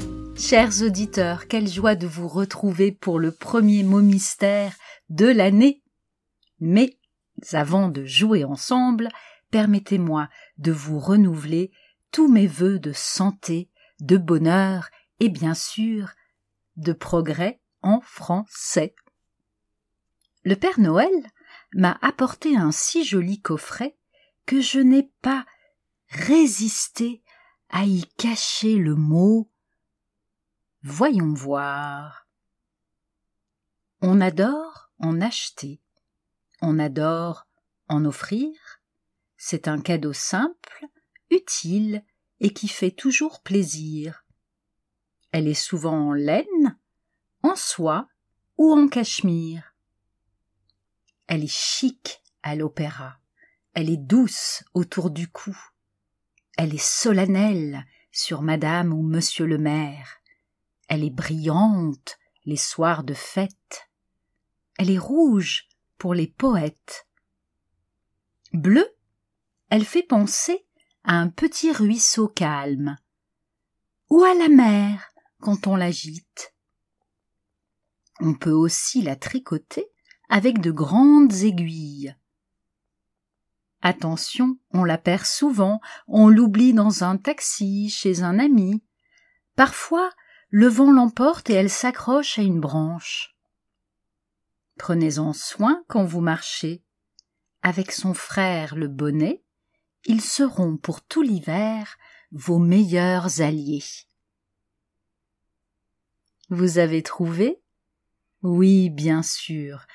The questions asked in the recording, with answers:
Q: Vous avez trouvé?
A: écharpe.